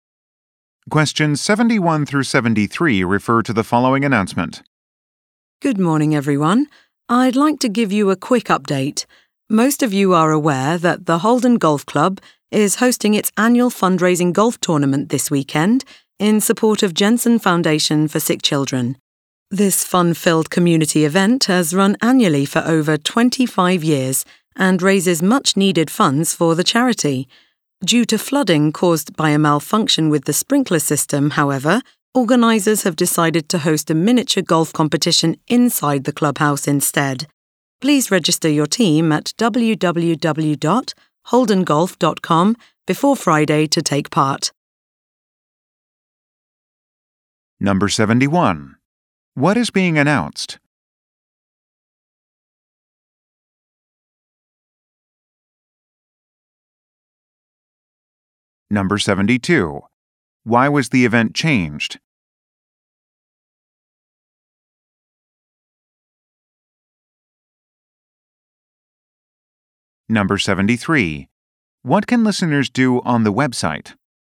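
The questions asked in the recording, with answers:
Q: What is being announced?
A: A change to a charity golf tournament

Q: Why was the event changed?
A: Flooding from a sprinkler malfunction

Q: What can listeners do on the website?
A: Register a team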